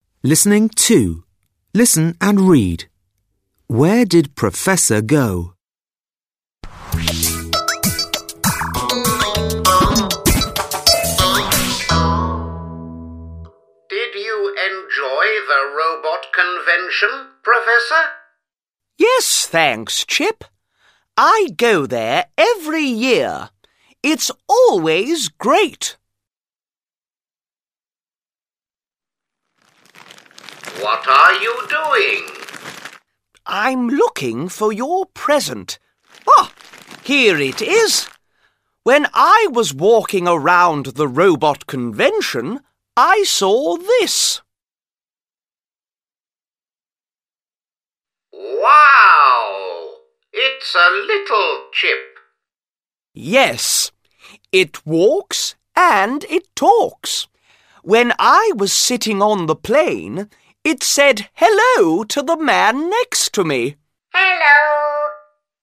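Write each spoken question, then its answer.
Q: Where did Professor go?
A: To the robot convention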